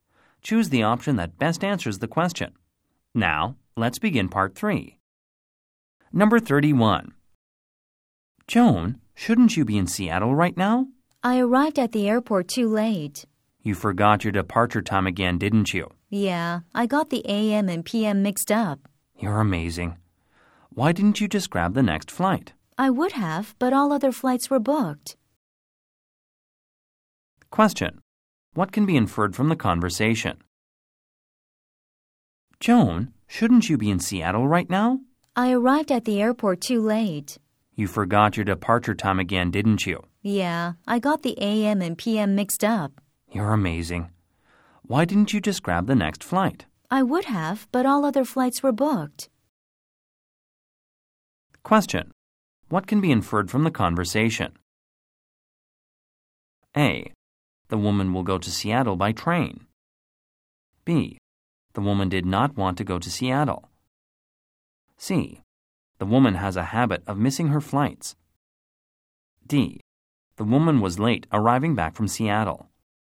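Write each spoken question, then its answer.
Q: What can be inferred from the conversation?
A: C: The woman has a habit of missing her flights.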